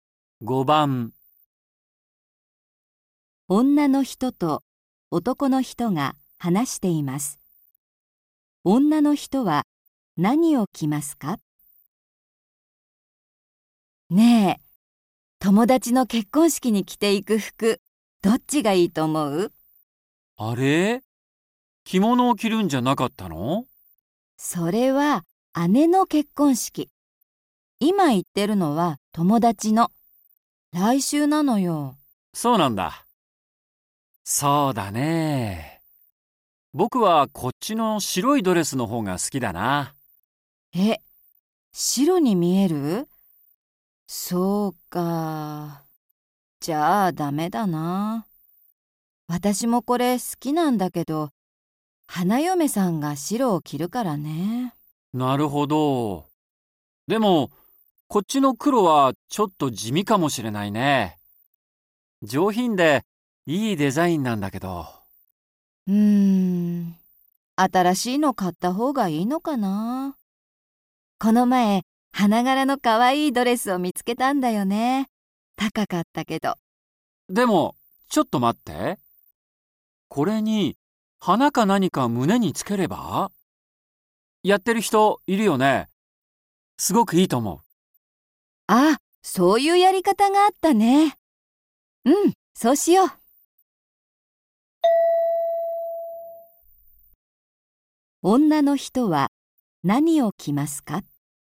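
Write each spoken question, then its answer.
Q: 女の人は何を着ますか?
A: 黒いドレス(胸に花などをつけて)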